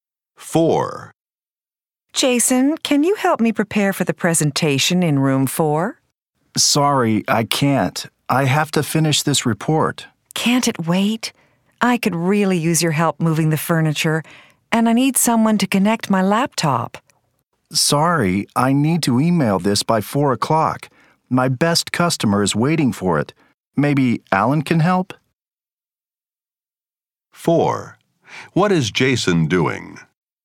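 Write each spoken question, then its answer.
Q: What is Jason doing?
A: Finishing a report to email to a customer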